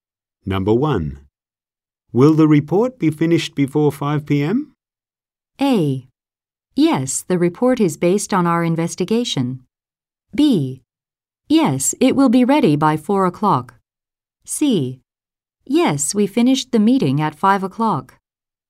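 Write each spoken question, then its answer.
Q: Will the report be finished before 5 p.m.?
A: B: Yes, it will be ready by 4 o'clock.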